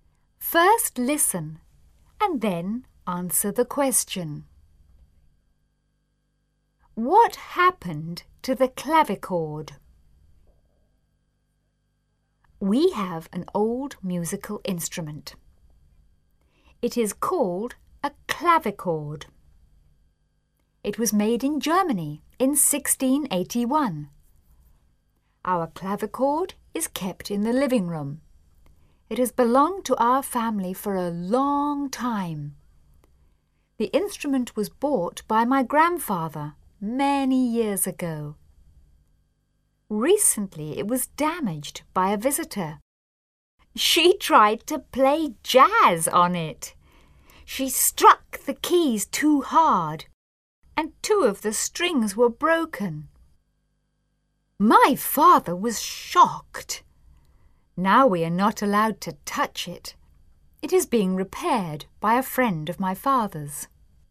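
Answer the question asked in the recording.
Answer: It was damaged by a visitor who played jazz on it too hard and broke two strings; now it is being repaired.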